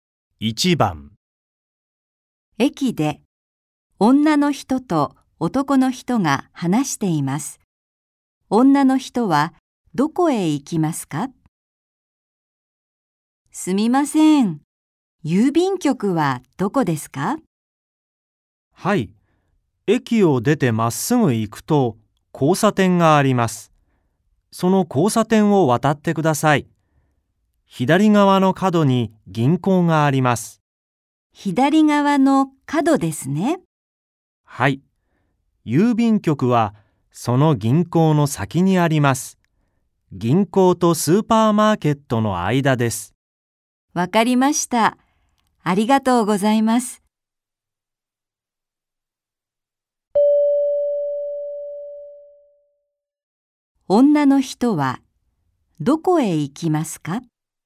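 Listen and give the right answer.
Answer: 郵便局(銀行とスーパーマーケットの間)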